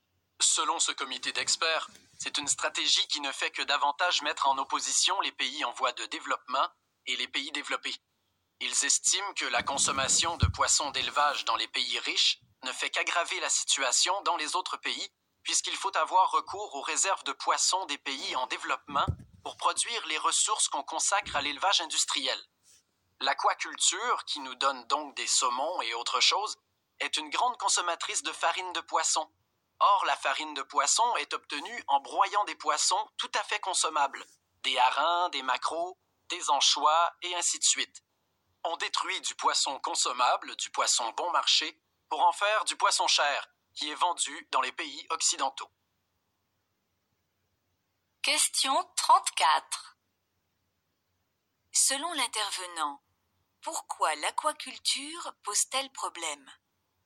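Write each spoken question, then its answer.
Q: Selon l'intervenant, pourquoi l'aquaculture pose-t-elle problème ?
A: Elle détruit du poisson consommable et bon marché des pays en développement pour produire du poisson cher vendu dans les pays riches.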